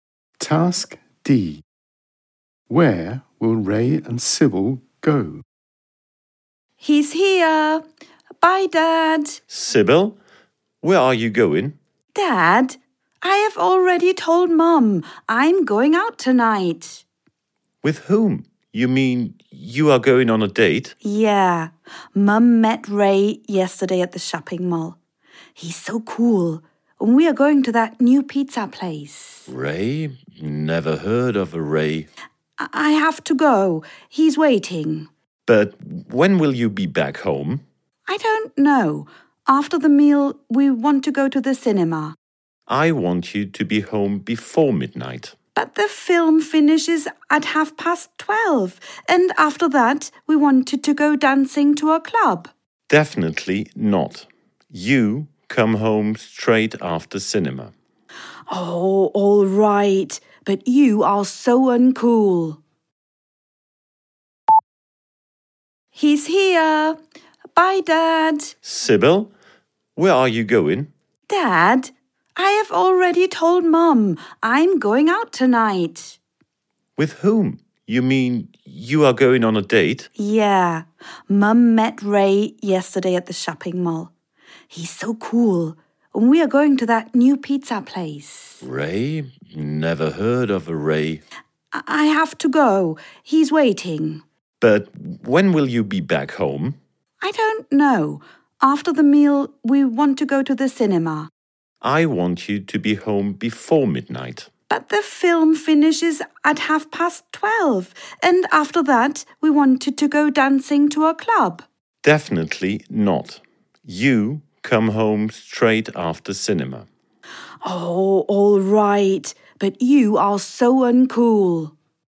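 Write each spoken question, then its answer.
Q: Where will Ray and Sybil go?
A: To the new pizza place and the cinema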